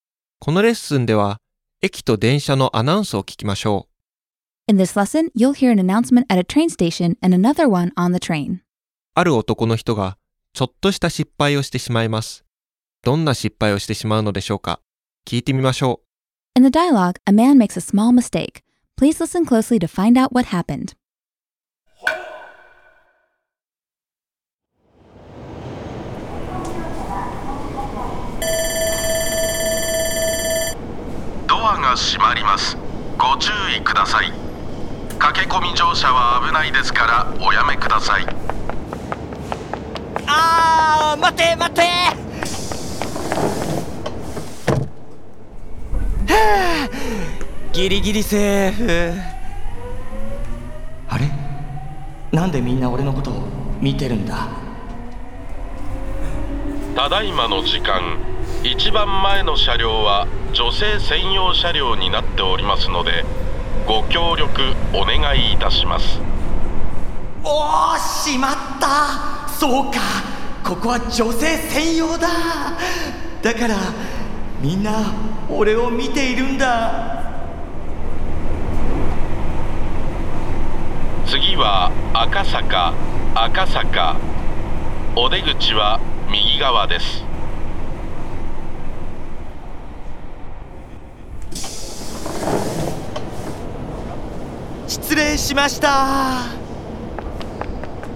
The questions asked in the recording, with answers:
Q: ある男の人がちょっとした失敗をしてしまいます。どんな失敗をしてしまうのでしょうか。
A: ああ、男の人は女性専用車両に乗ってしまったんですね。